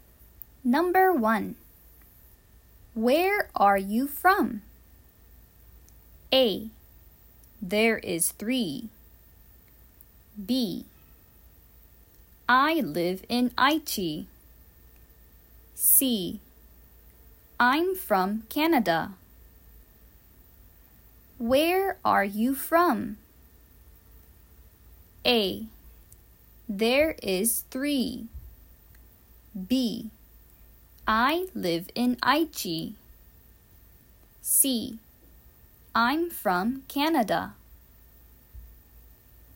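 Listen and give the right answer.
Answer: C: I'm from Canada.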